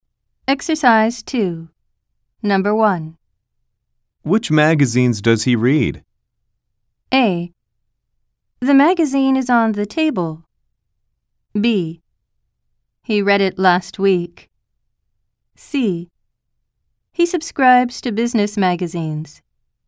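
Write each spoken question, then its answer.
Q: Which magazines does he read?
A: C: He subscribes to business magazines.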